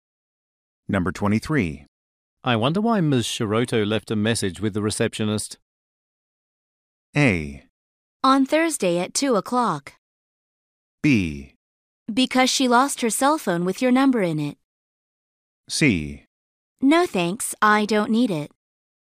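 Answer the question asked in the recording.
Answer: B: Because she lost her cell phone with your number in it.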